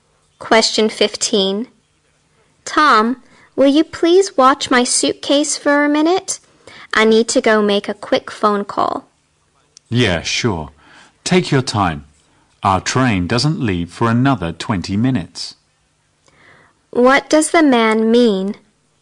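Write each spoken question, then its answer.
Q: What does the man mean?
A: He'll watch her suitcase; there is plenty of time before the train leaves.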